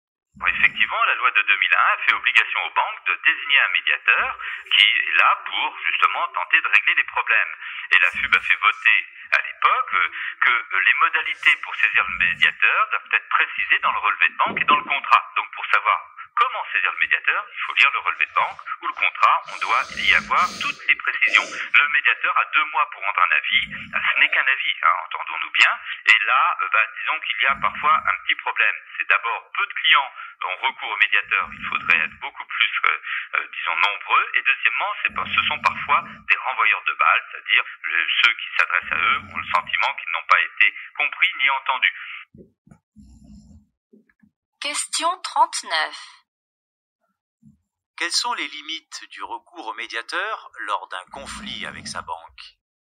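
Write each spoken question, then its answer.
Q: Quelles sont les limites du recours au médiateur lors d'un conflit avec sa banque ?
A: Il ne rend qu'un avis ; peu de clients y ont recours et les médiateurs renvoient parfois la balle, les clients ne se sentant ni compris ni entendus.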